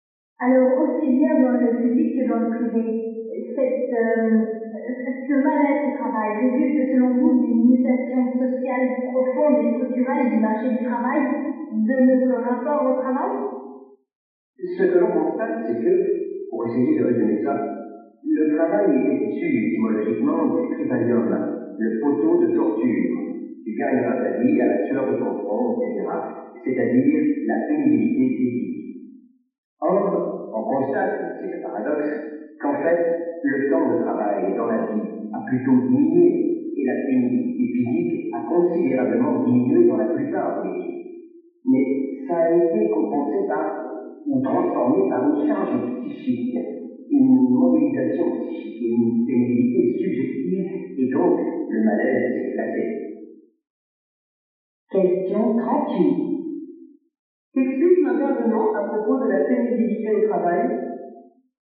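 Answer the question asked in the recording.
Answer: La pénibilité physique a beaucoup diminué, mais elle a été remplacée par une charge psychique, une pénibilité subjective.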